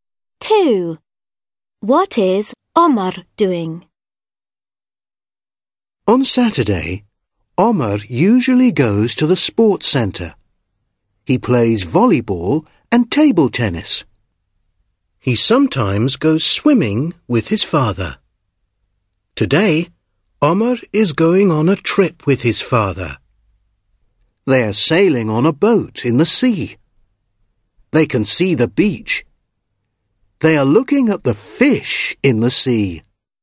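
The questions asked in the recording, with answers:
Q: What is Omar doing?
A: Sailing on a boat in the sea with his father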